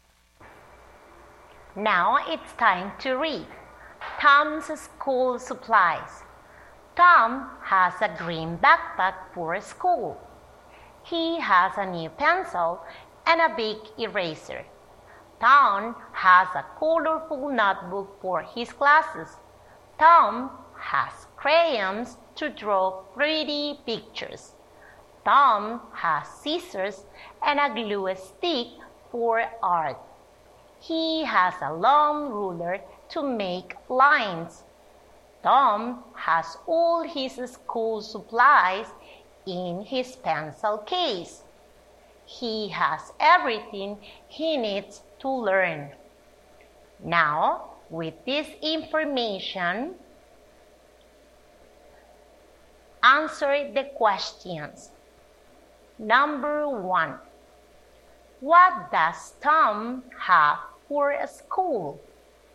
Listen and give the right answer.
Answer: Tom has a green backpack.